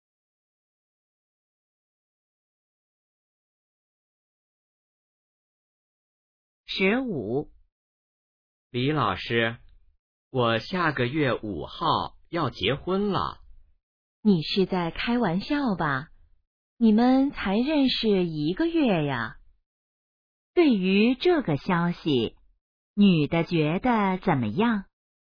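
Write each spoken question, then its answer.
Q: 女的觉得怎么样?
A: 不相信,很吃惊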